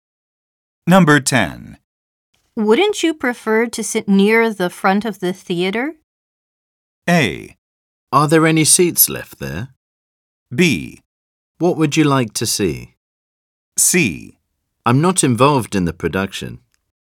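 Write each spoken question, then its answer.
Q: Wouldn't you prefer to sit near the front of the theater?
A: A: Are there any seats left there?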